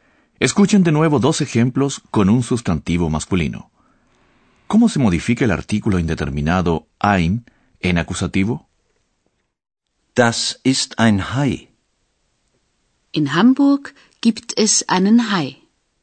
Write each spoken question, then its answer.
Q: ¿Cómo se modifica el artículo indeterminado ein en acusativo?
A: El artículo indeterminado masculino ein pasa a ser einen.